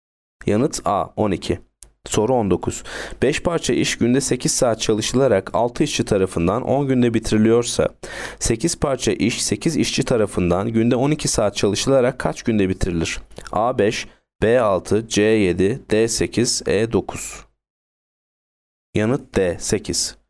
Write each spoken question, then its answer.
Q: 5 parça iş günde 8 saat çalışılarak 6 işçi tarafından 10 günde bitiriliyorsa, 8 parça iş 8 işçi tarafından günde 12 saat çalışılarak kaç günde bitirilir?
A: Yanıt D 8.